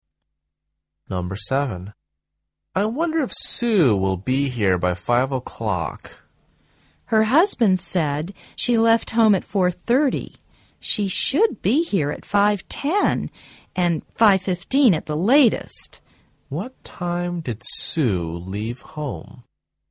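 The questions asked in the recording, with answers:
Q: What time did Sue leave home?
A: At 4:30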